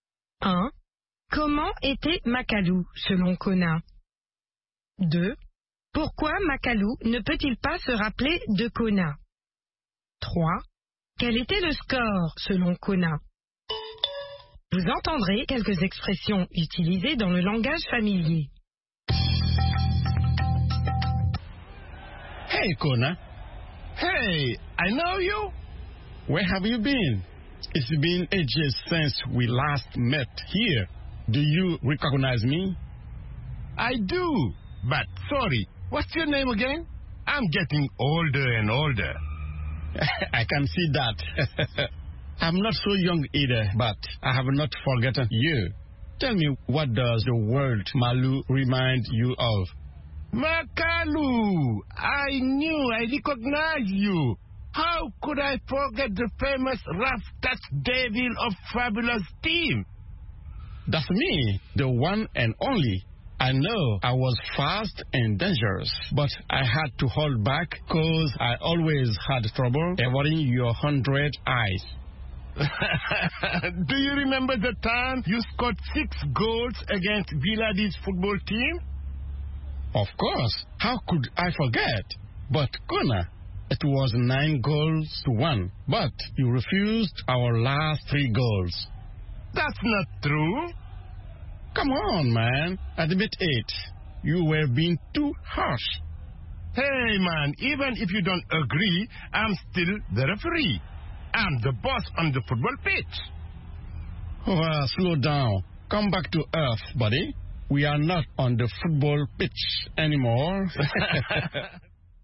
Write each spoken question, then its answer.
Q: Pourquoi Makalu ne peut-il pas se rappeler de Kona?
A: Parce qu'il devient de plus en plus vieux.